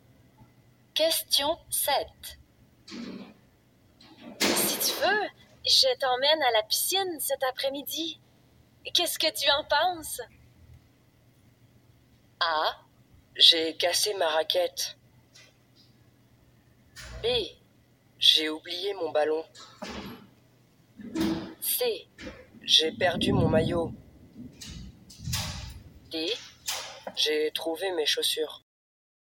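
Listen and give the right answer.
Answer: C: J'ai perdu mon maillot.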